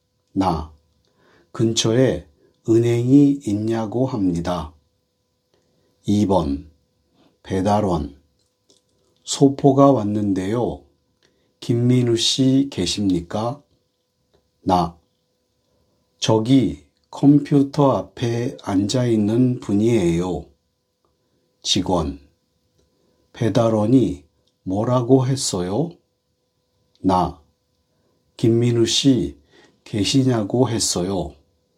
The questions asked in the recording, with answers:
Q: 배달원이 뭐라고 했어요?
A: 김민우 씨 계시냐고 했어요.